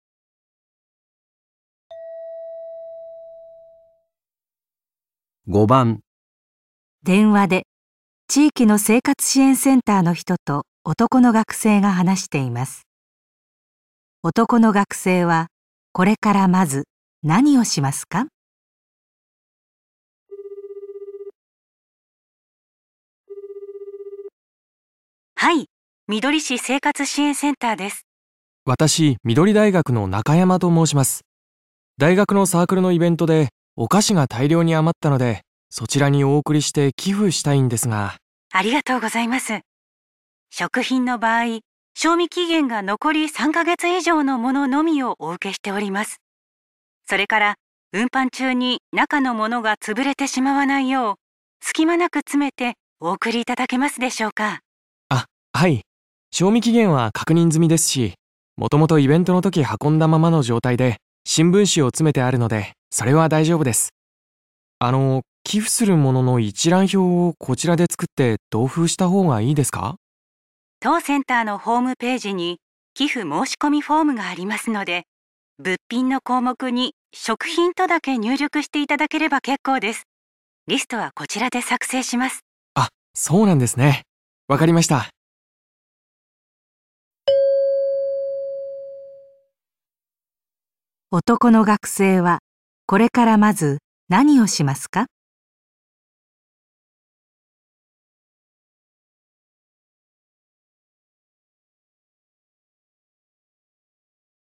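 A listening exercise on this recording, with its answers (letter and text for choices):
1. 5番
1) 食品の賞味期限を確かめる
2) 箱の隙間に新聞紙を詰める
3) 寄付する物の一覧を作成する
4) 申込フォームに入力する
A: 4) 申込フォームに入力する

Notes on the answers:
当センターのホームページに寄付申込フォームがありますので、 物品の項目に食品とだけ入力していただければ結構です。

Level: N1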